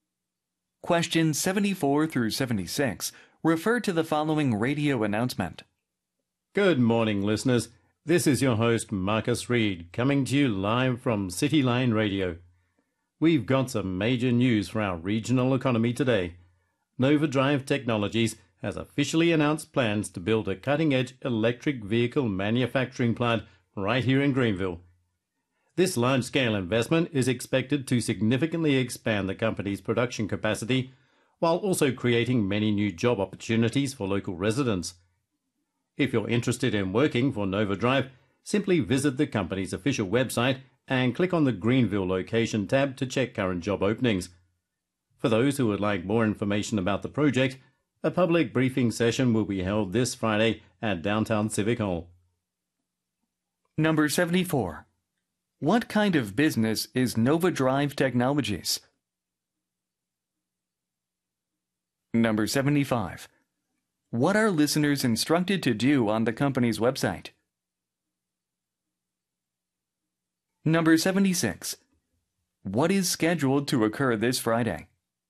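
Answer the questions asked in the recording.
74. An electric vehicle manufacturer
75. Click the Greenville location tab to check current job openings
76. A public briefing session at Downtown Civic Hall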